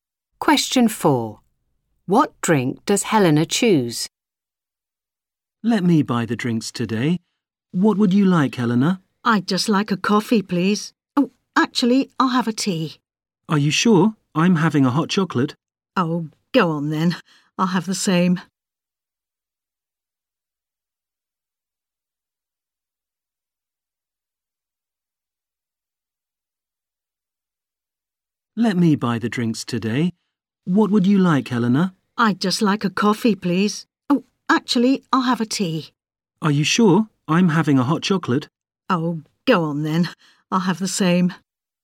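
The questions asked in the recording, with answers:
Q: What drink does Helena choose?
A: Hot chocolate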